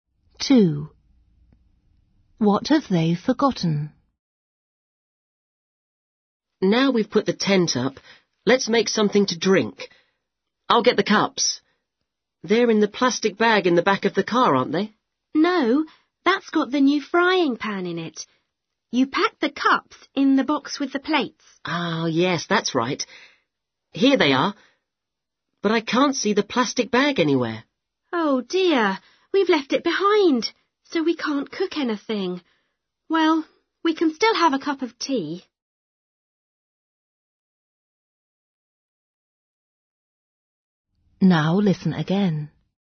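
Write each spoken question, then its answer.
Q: What have they forgotten?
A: the plastic bag with the frying pan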